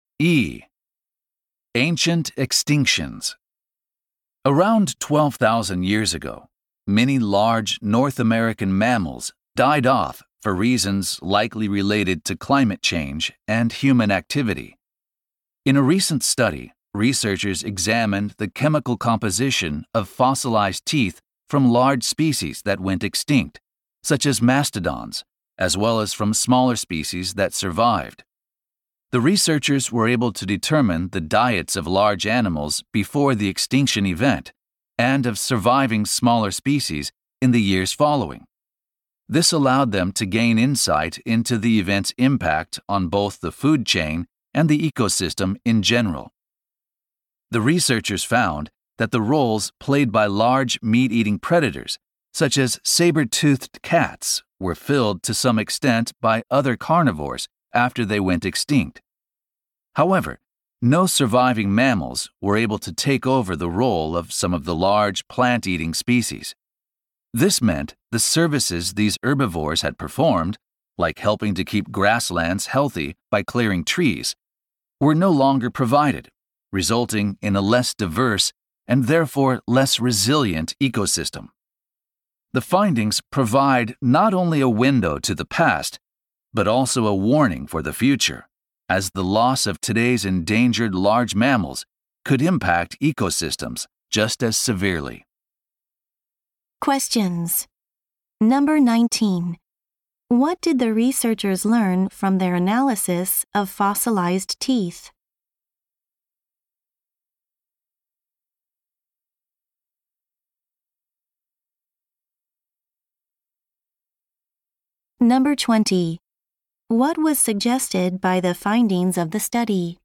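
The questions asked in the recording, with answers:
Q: What did the researchers learn from their analysis of fossilized teeth?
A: The diets of large extinct animals and surviving smaller species, showing that no surviving mammals took over some large herbivores' roles

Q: What was suggested by the findings of the study?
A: Losing today's endangered large mammals could harm ecosystems just as severely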